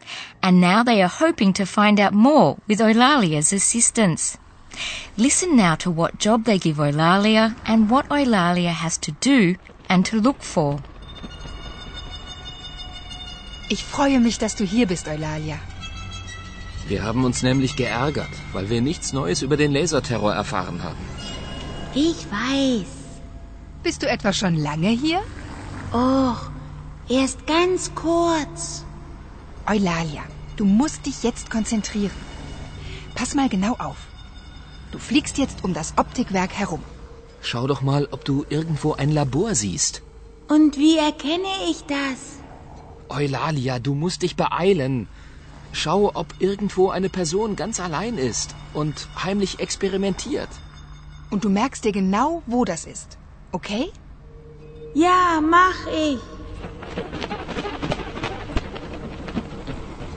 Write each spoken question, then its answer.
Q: Listen now to what job they give Eulalia and what Eulalia has to do and to look for.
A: Eulalia is to fly around the optics factory.